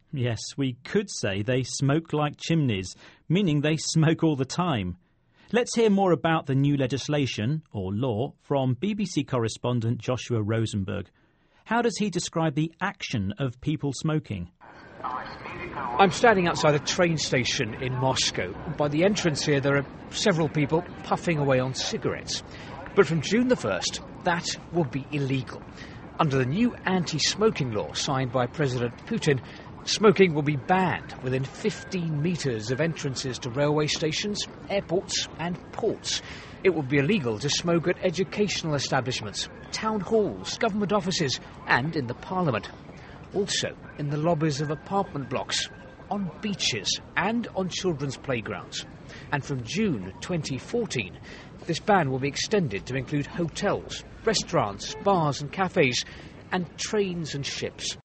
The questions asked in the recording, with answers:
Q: How does he describe the action of people smoking?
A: describing people puffing away on cigarettes